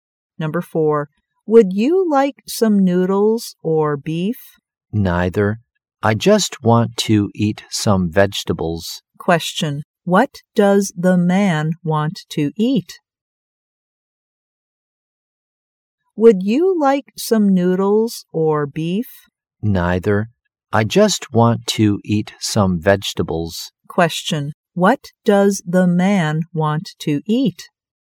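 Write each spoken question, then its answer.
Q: What does the man want to eat?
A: Vegetables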